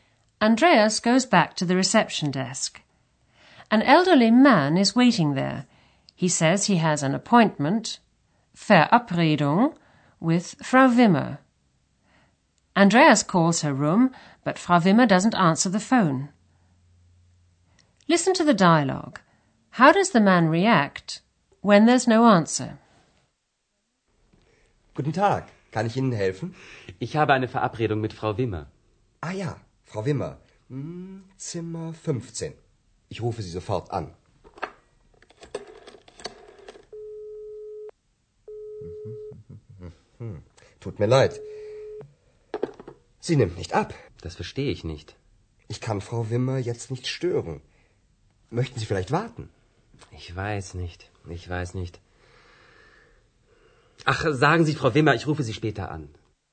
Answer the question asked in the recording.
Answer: The man leaves a message for Frau Wimmer that he'll call her again later.